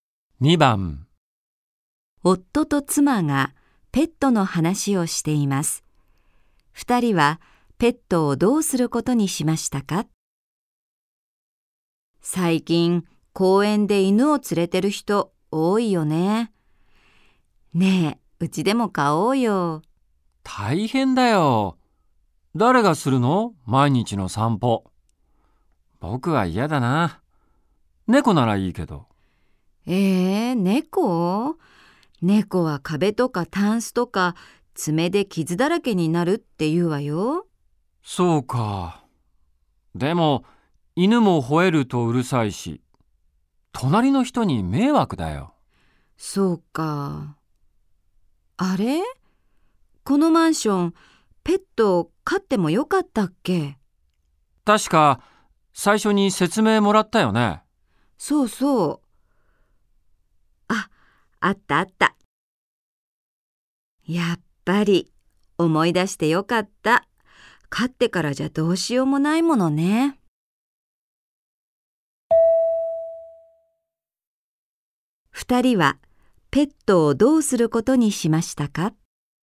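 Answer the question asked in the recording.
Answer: 飼わないことにした(マンションでペットを飼ってはいけないから)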